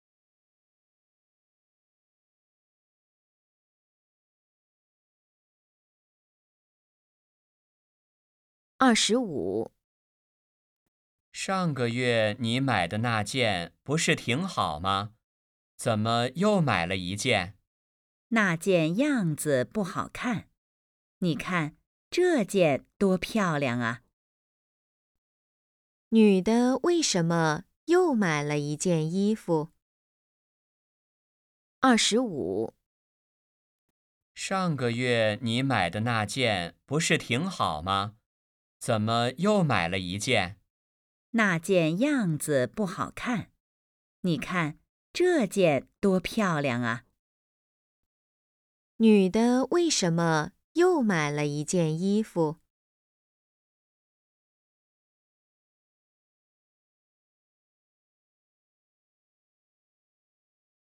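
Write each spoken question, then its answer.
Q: 女的为什么又买了一件衣服?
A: 上个月买的那件样子不好看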